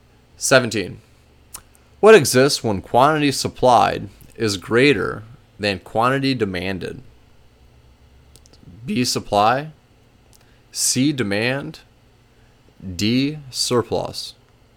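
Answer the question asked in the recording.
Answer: D: surplus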